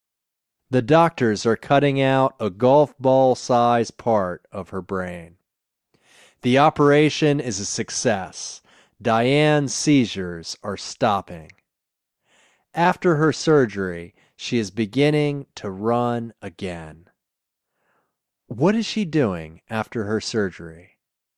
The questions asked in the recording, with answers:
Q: What is she doing after her surgery?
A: She is beginning to run again after her surgery.